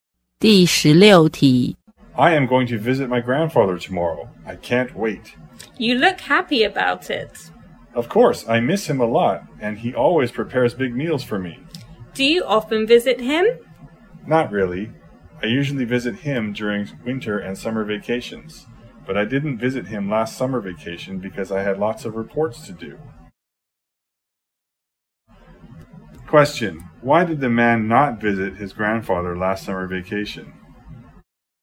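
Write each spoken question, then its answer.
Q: Why did the man not visit his grandfather last summer vacation?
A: He had lots of reports to do.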